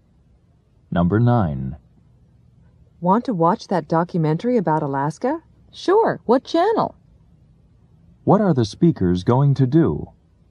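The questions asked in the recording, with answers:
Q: What are the speakers going to do?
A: Watch a documentary about Alaska on TV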